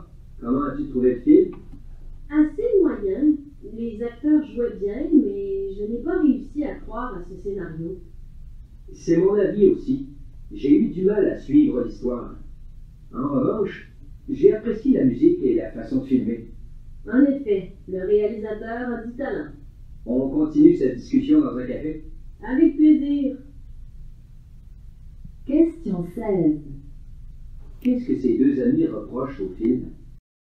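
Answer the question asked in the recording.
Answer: Le scénario, l'histoire difficile à croire et à suivre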